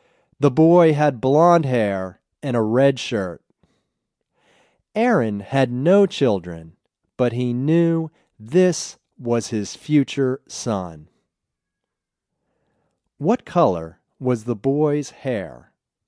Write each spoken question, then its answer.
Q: What color was the boy's hair?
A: The boy's hair was blonde.